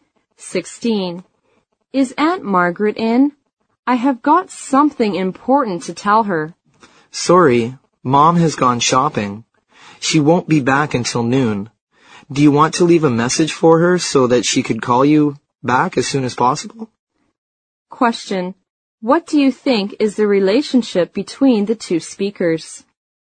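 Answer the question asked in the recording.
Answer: Cousins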